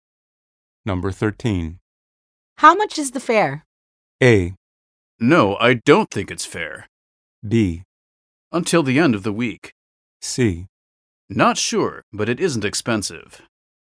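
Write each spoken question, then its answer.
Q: How much is the fare?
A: C: Not sure, but it isn't expensive.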